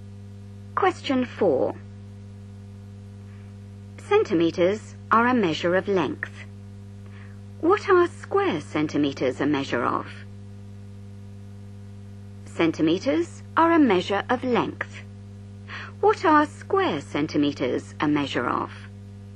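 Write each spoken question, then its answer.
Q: What are square centimeters a measure of?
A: area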